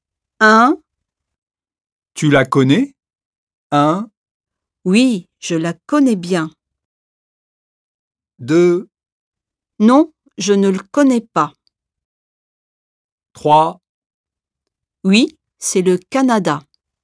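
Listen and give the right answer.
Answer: 1: Oui, je la connais bien.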